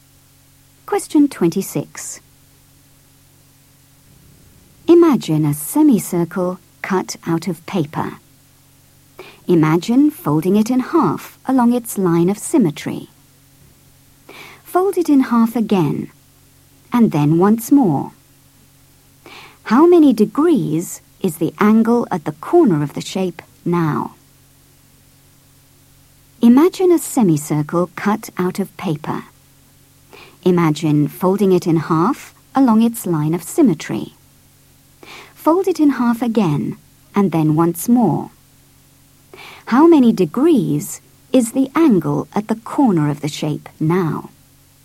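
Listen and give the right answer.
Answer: 22.5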